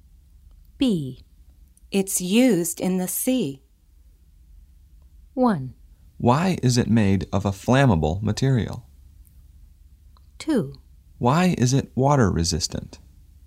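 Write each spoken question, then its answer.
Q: It's used in the sea.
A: 2: Why is it water resistant?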